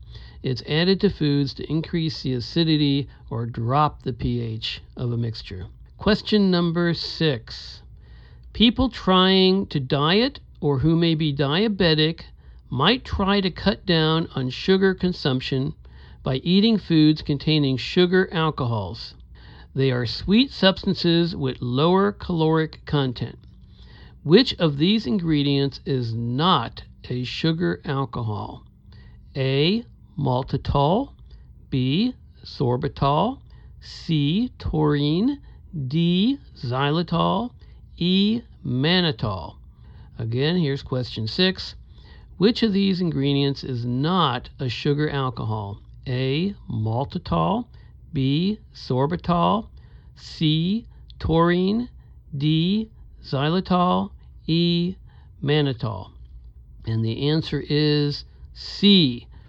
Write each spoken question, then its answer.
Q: Which of these ingredients is not a sugar alcohol?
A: And the answer is C. Taurine.